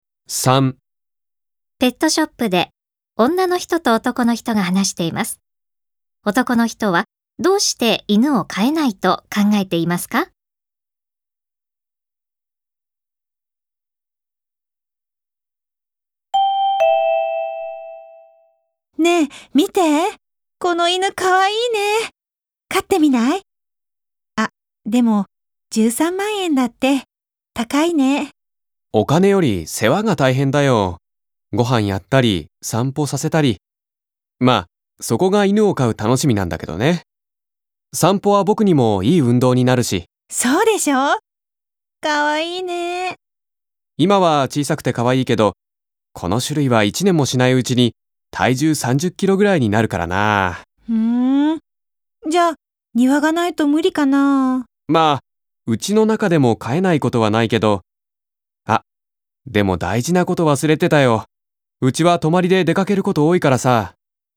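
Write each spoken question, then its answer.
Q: 男の人はどうして犬を飼えないと考えていますか?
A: 泊まりで出かけることが多いから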